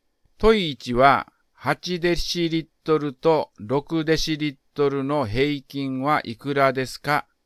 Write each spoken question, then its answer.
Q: 問い1は、8デシリットルと6デシリットルの平均はいくらですか?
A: 答えは7デシリットルです。